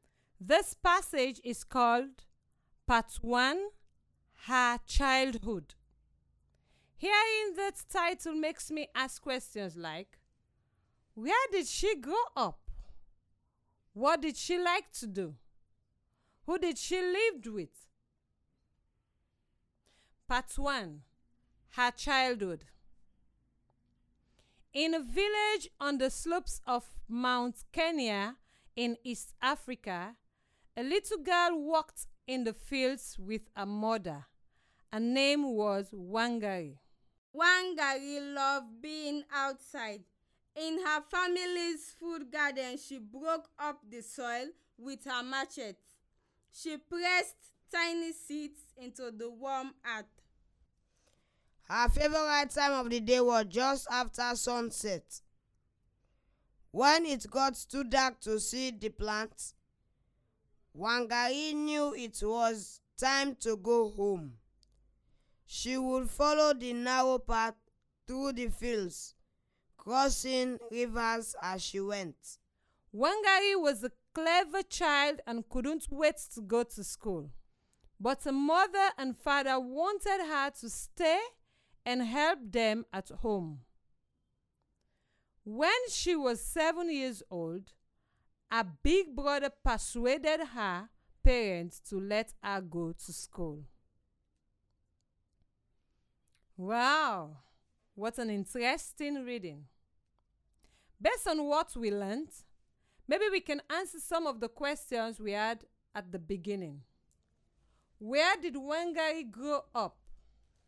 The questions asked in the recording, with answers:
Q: where did she grow up?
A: Wangari grew up in Kenya in East Africa.

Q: What did she like to do?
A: She liked to be outside walking in the garden growing plants.

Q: Who did she live with?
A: From the passage, I know that she lived with her brother, her father, and her mother.